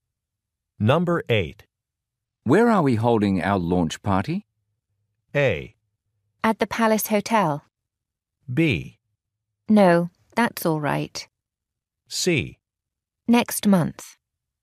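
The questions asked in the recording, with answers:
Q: Where are we holding our launch party?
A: A: At the Palace Hotel.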